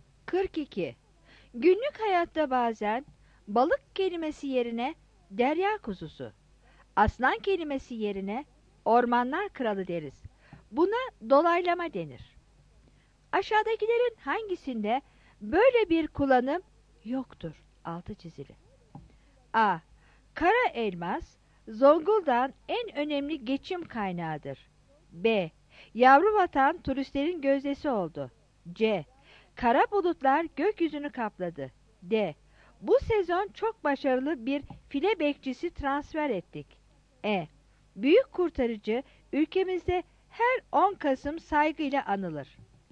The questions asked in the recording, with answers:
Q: Aşağıdakilerin hangisinde böyle bir kullanım yoktur?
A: 42 C